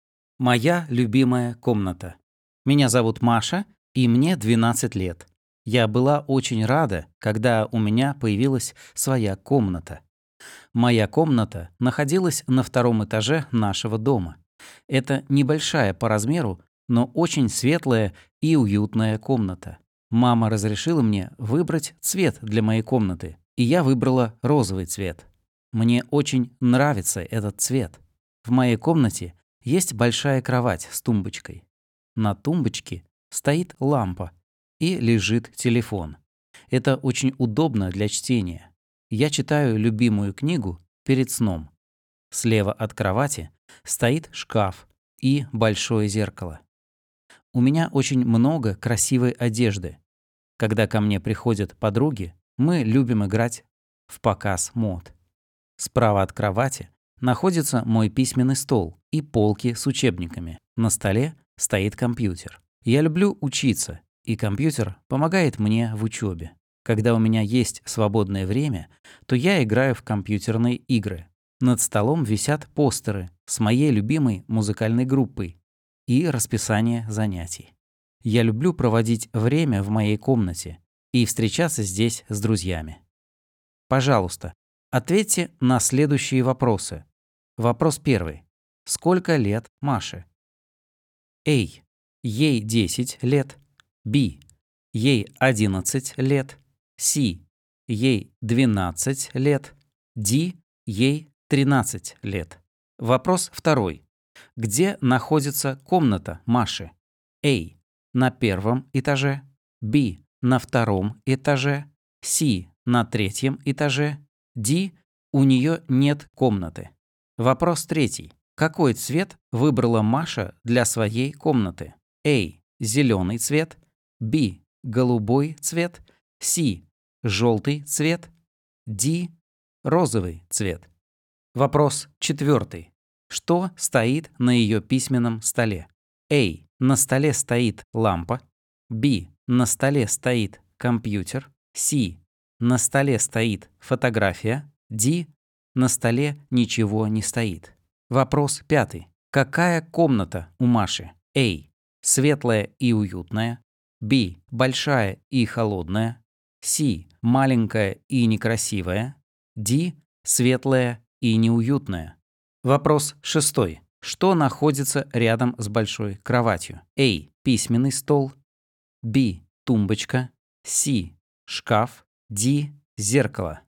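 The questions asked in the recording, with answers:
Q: Сколько лет Маше?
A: C: Ей 12 лет.

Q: Где находится комната Маши?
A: B: На втором этаже.

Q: Какой цвет выбрала Маша для своей комнаты?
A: D: Розовый цвет.

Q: Что стоит на ее письменном столе?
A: B: На столе стоит компьютер.

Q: Какая комната у Маши?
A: A: Светлая и уютная.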